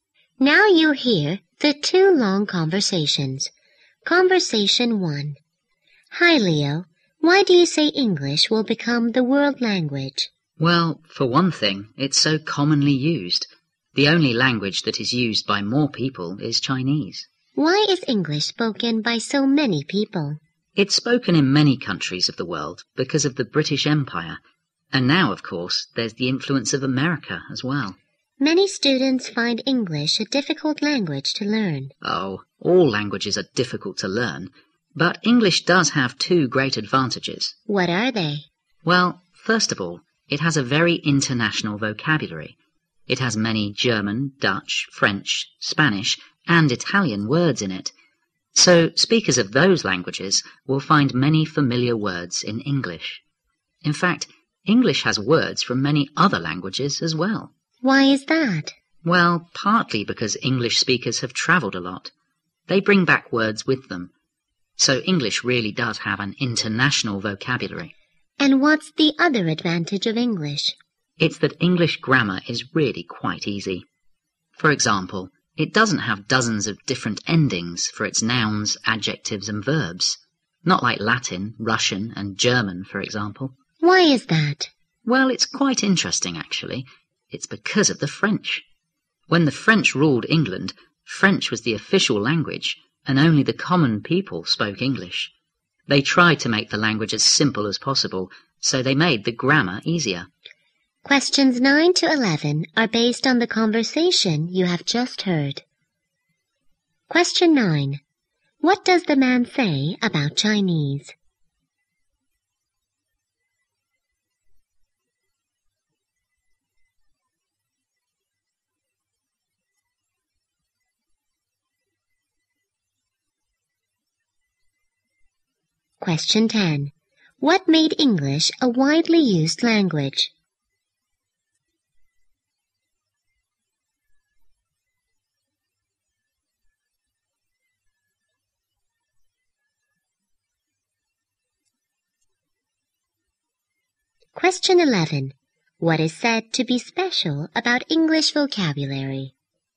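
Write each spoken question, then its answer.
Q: What does the man say about Chinese?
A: It is used by more people than any other language.

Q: What made English a widely used language?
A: The British Empire and the influence of America.

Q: What is said to be special about English vocabulary?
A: It is very international.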